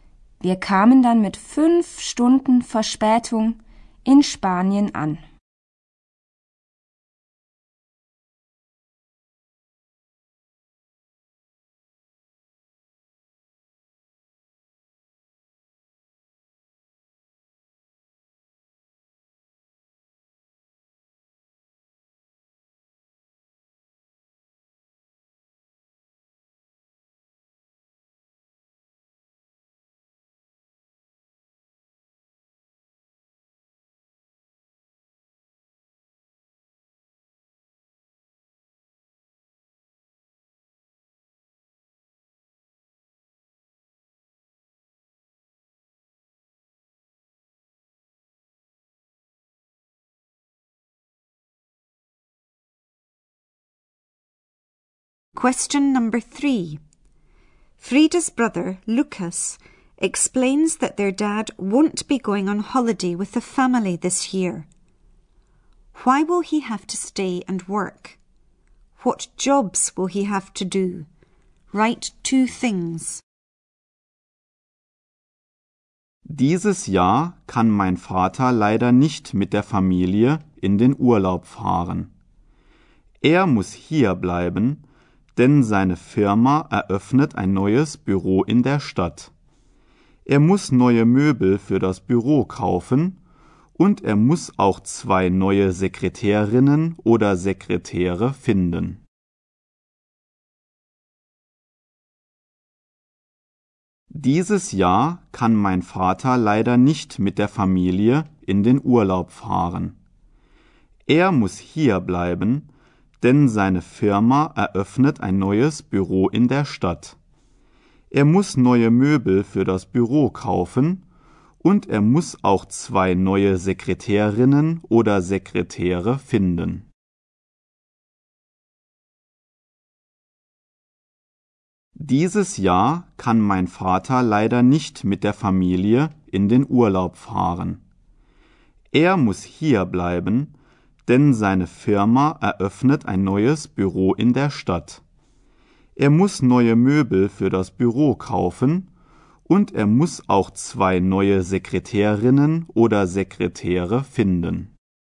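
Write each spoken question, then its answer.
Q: Why will he have to stay and work?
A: His company is opening a new office in the town

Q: What jobs will he have to do?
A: Buy new furniture for the office and find two new secretaries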